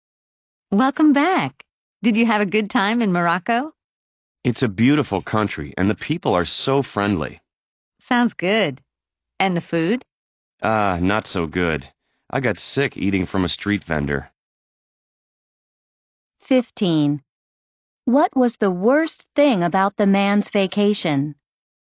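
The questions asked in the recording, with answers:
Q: What was the worst thing about the man's vacation?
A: The food; he got sick eating from a street vendor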